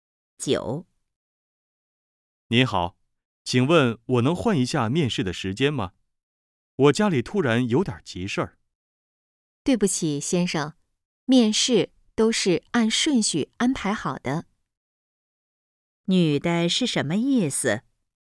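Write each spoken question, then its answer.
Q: 女的是什么意思?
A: 不能换面试时间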